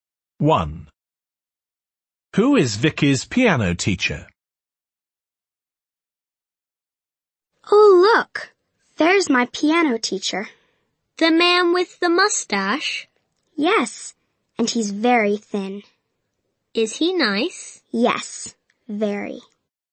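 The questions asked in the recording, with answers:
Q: Who is Vicky's piano teacher?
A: The thin man with the mustache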